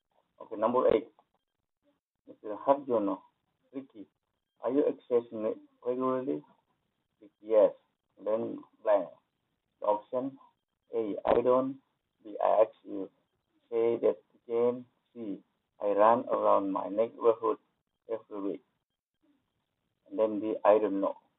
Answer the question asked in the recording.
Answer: The correct answer is C. I run around my neighborhood every week.